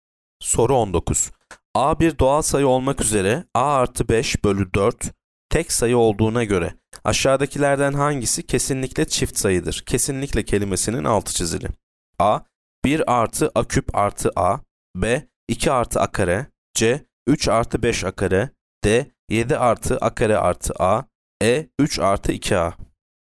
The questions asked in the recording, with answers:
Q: A bir doğal sayı olmak üzere A artı 5 bölü 4 tek sayı olduğuna göre aşağıdakilerden hangisi kesinlikle çift sayıdır?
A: Yanıt C. 3 artı 5 A kare.